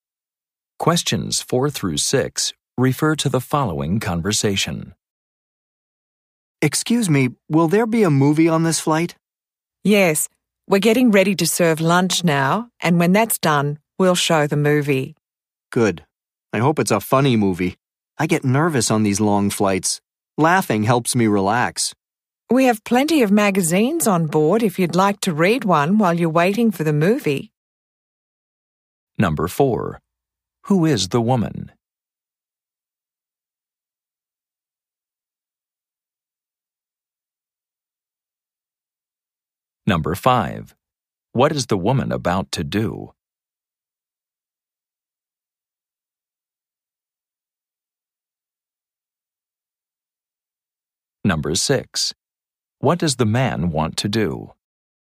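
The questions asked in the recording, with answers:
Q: Who is the woman?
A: A flight attendant

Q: What is the woman about to do?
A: Serve lunch

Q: What does the man want to do?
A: Watch a funny movie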